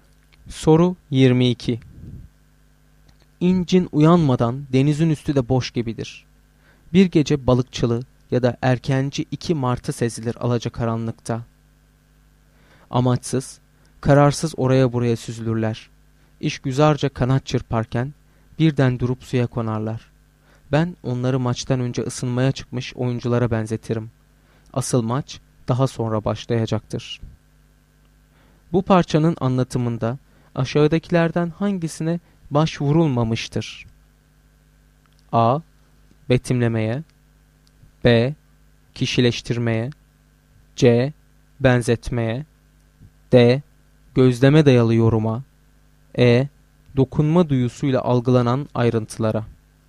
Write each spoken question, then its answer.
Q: Bu parçanın anlatımında aşağıdakilerden hangisine başvurulmamıştır?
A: Doğru cevap E şıkkı.